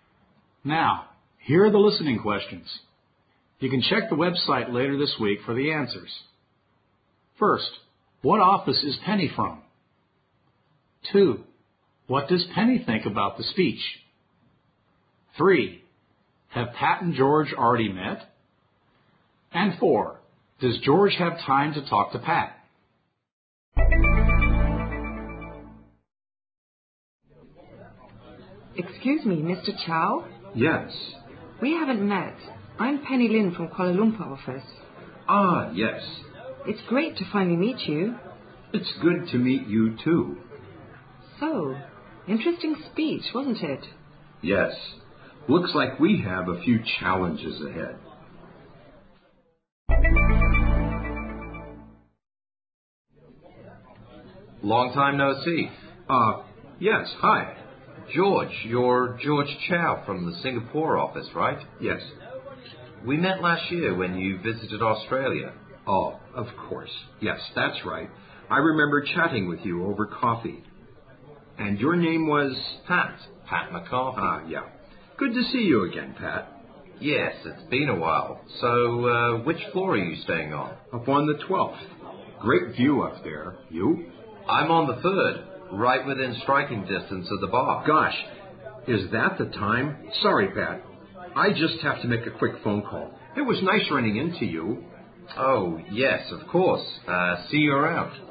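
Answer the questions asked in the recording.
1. The Kuala Lumpur office
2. It was interesting
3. Yes, last year in Australia
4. Doesn't seem so.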